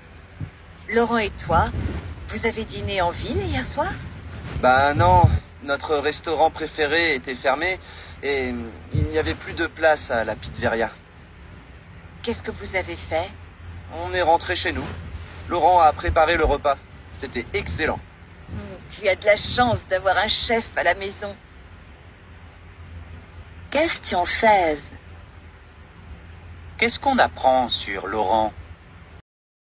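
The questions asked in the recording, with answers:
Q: Qu'est-ce qu'on apprend sur Laurent ?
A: Il cuisine bien (il a préparé un excellent repas à la maison)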